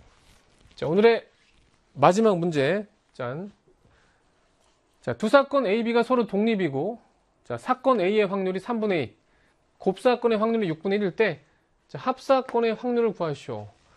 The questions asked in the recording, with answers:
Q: 자, 두 사건 A, B가 서로 독립이고, 자, 사건 A의 확률이 3분의 2, 곱사건의 확률이 6분의 1일 때, 자, 합사건의 확률을 구하시오.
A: 답은 4분의 3이죠.